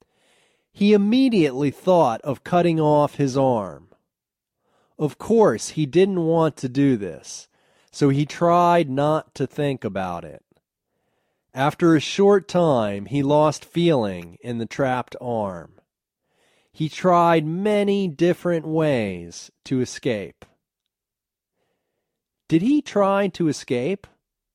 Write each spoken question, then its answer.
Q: Did he try to escape?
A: Yes, he tried many ways to escape.